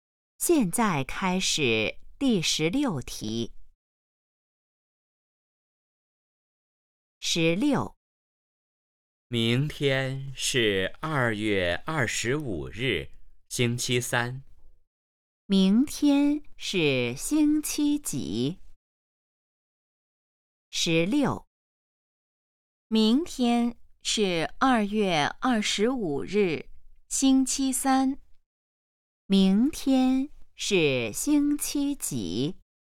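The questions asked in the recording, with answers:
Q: 明天是星期几?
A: 星期三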